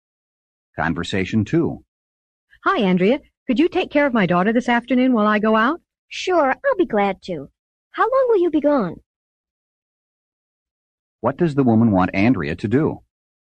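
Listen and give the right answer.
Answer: Take care of her daughter this afternoon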